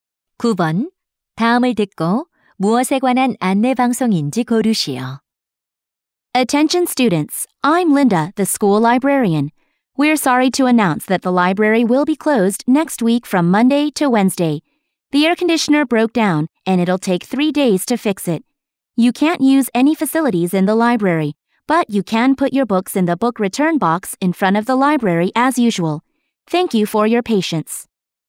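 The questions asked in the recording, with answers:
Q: 다음을 듣고 무엇에 관한 안내 방송인지 고르시오.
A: 에어컨 수리로 인한 도서관 임시 휴관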